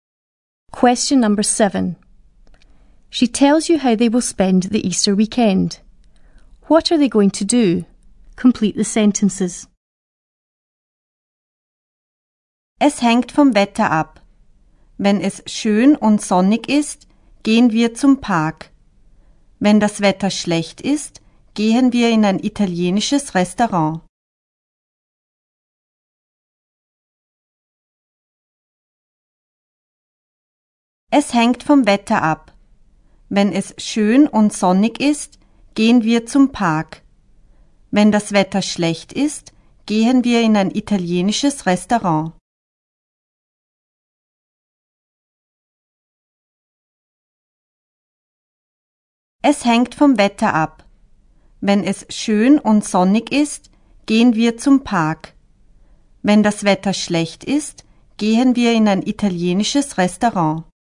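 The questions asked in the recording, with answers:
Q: What are they going to do?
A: Go to the park if it's sunny; go to an Italian restaurant if the weather is bad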